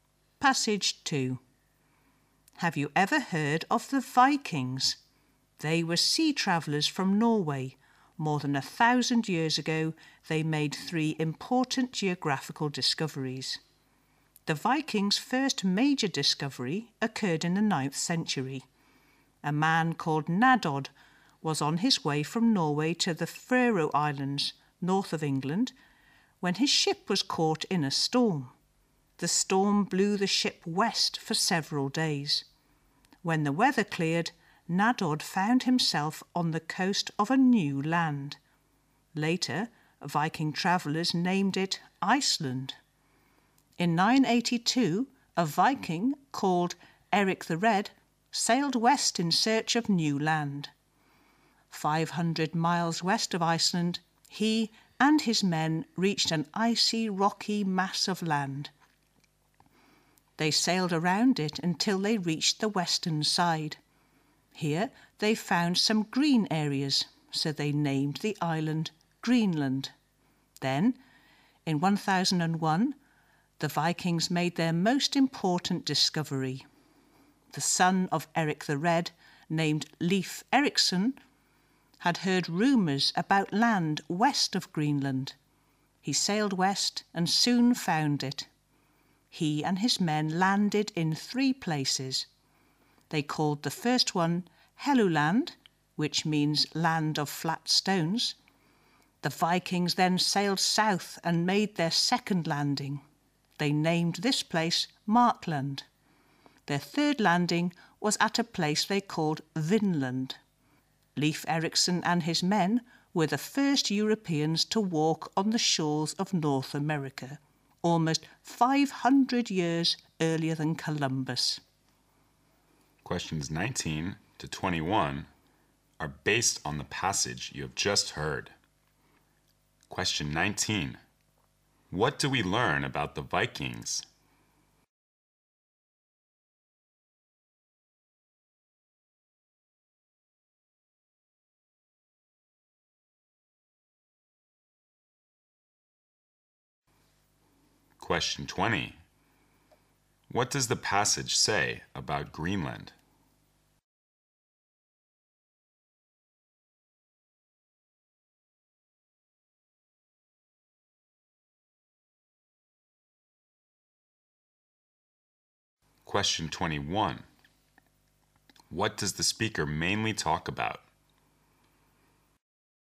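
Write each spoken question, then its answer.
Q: What do we learn about the Vikings?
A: They were sea travellers from Norway who made three important geographical discoveries

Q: What does the passage say about Greenland?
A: It was named for the green areas found on its western side

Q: What does the speaker mainly talk about?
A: The Vikings' geographical discoveries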